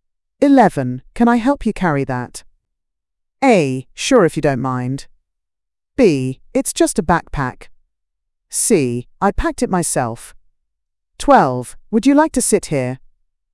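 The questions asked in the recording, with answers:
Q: Can I help you carry that?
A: A: Sure, if you don't mind.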